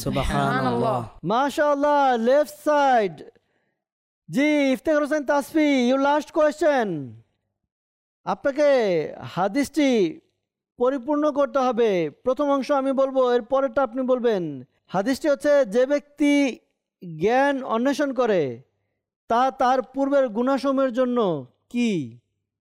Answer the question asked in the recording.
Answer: জি উত্তর হবে, কাফফারা হয়ে যায়।